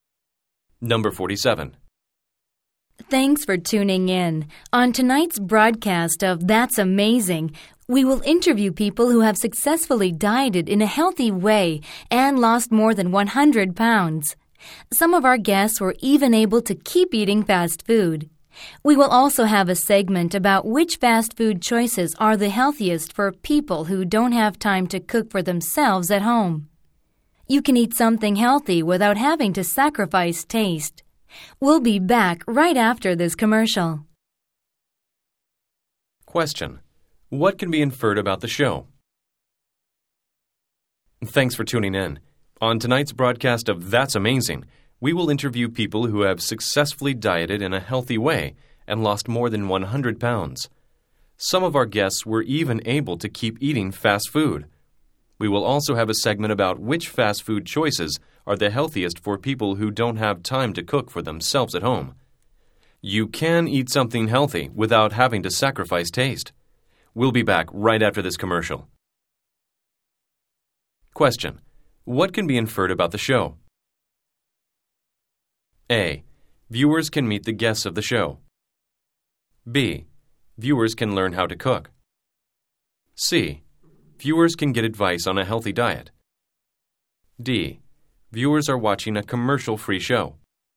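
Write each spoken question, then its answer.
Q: What can be inferred about the show?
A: C: Viewers can get advice on a healthy diet.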